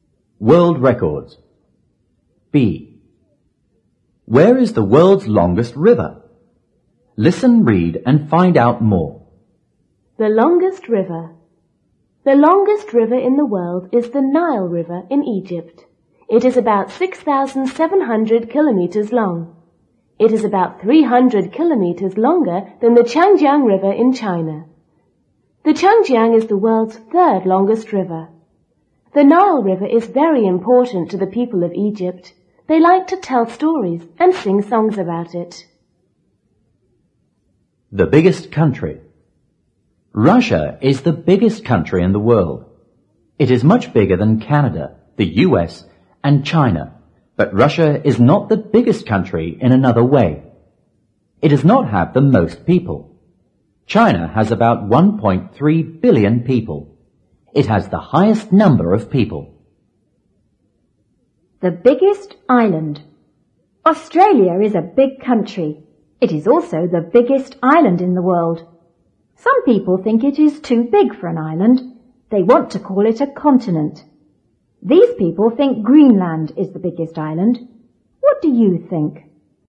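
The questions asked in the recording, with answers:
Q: Where is the world's longest river?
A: In Egypt (the Nile River)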